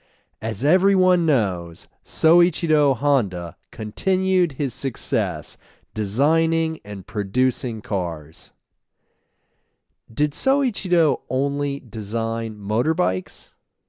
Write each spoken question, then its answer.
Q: Did Soichiro only design motorbikes?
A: No, he didn't only design motorbikes.